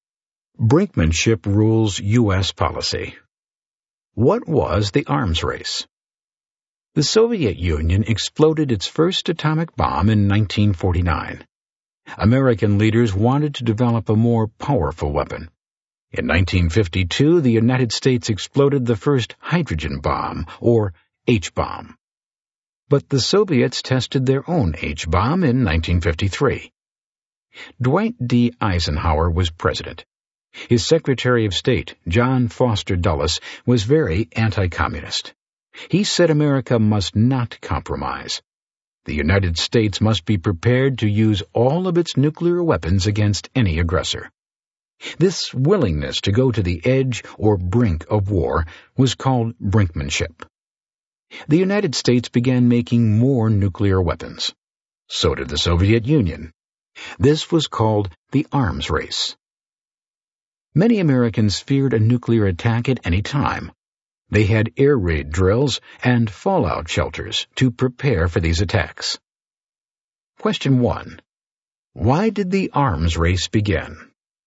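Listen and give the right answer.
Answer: After the Soviet Union exploded its first atomic bomb in 1949, the US wanted a more powerful weapon and both sides built more nuclear weapons.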